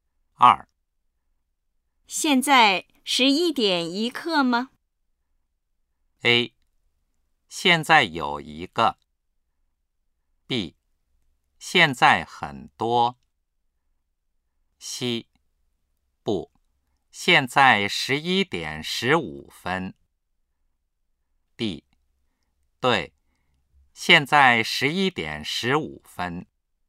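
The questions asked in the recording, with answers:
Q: 现在11:01吗?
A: C: 不,现在11:15。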